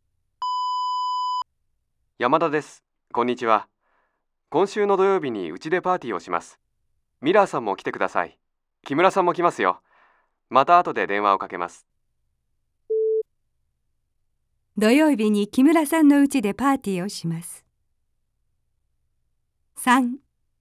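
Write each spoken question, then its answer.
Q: 土曜日に木村さんのうちでパーティーをします。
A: ×(山田さんのうちでパーティーをします)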